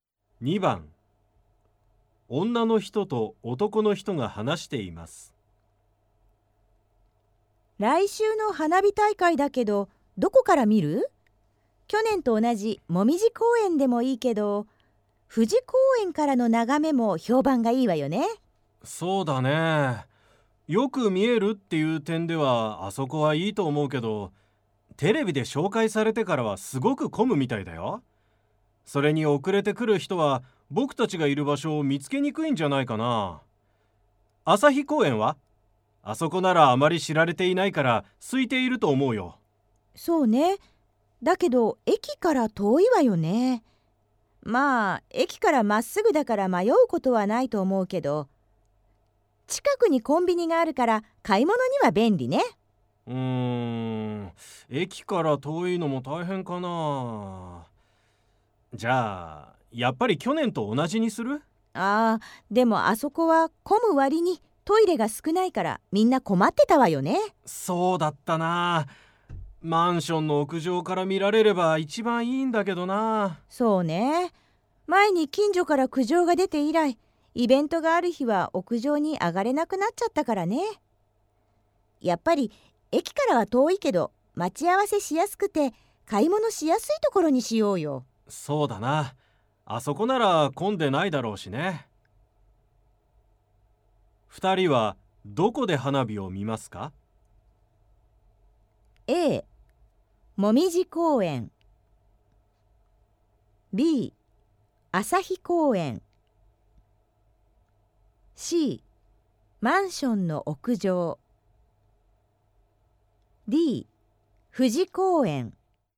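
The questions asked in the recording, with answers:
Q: 二人はどこで花火を見ますか?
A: B: 朝日公園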